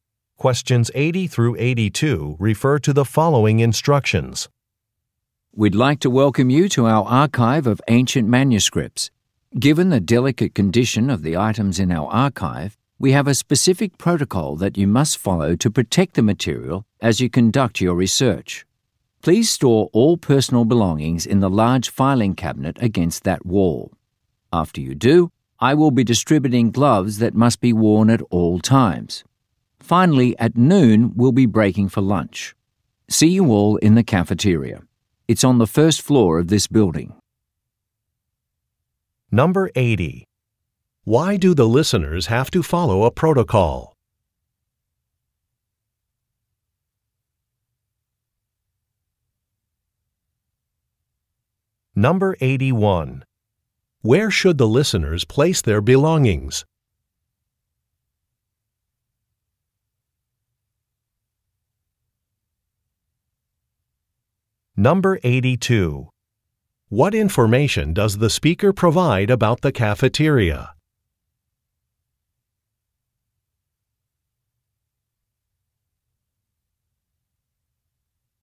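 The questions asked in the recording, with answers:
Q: Why do the listeners have to follow a protocol?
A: To protect the delicate manuscripts in the archive

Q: Where should the listeners place their belongings?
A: In the large filing cabinet against the wall

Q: What information does the speaker provide about the cafeteria?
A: It is on the first floor of the building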